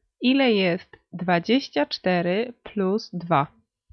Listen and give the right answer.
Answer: 26.